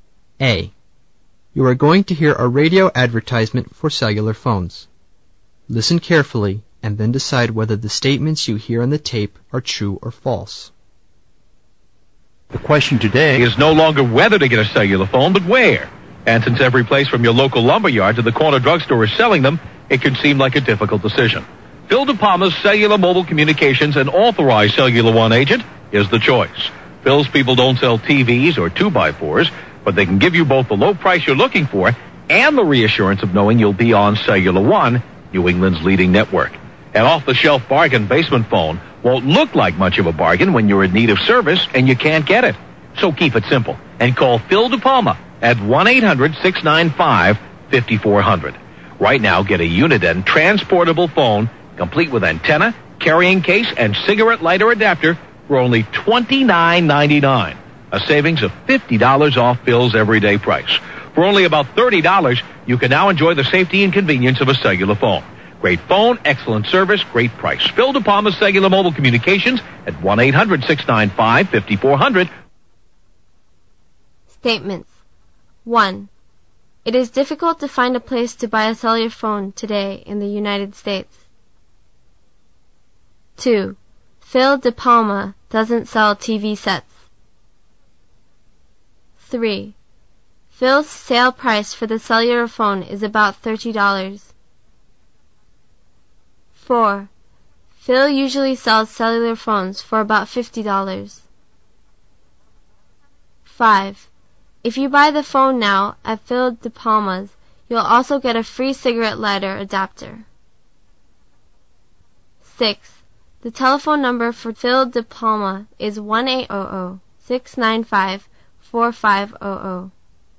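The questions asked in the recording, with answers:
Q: It is difficult to find a place to buy a cellular phone today in the United States.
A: False

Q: Phil DePalma doesn't sell TV sets.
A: True

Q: Phil's sale price for the cellular phone is about $30.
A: True

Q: Phil usually sells cellular phones for about $50.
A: False

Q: The telephone number for Phil DePalma is 1-800-695-4500.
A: False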